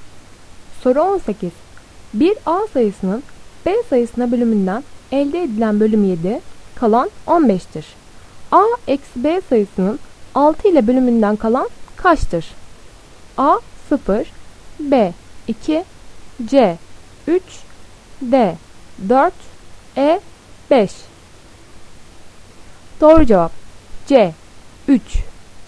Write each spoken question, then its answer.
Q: A eksi B sayısının 6 ile bölümünden kalan kaçtır?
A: Doğru cevap C 3.